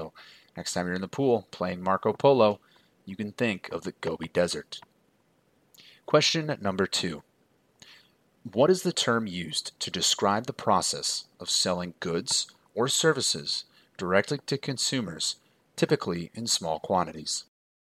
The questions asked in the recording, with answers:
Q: What is the term used to describe the process of selling goods or services directly to consumers, typically in small quantities?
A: And that term is, of course, retail.